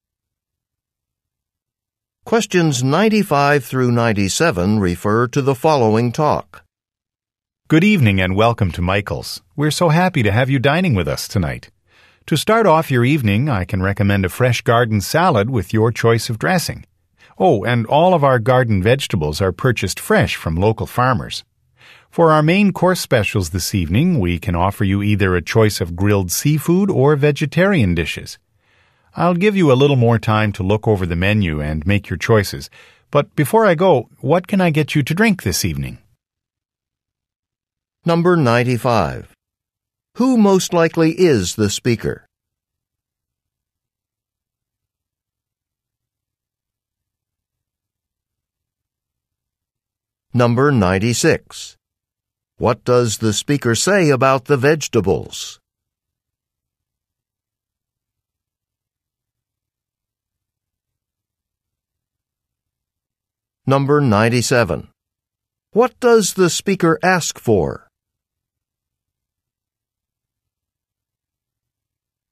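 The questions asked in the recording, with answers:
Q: Who most likely is the speaker?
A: A waiter

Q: What does the speaker say about the vegetables?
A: They are bought fresh from local farmers

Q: What does the speaker ask for?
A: Drink orders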